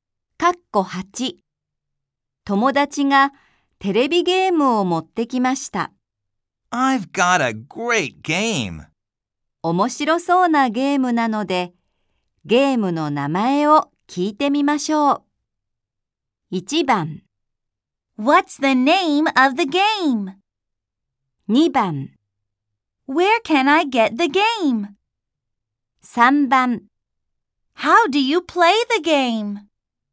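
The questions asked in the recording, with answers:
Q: 面白そうなゲームなので、ゲームの名前を聞いてみましょう。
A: 1: What's the name of the game?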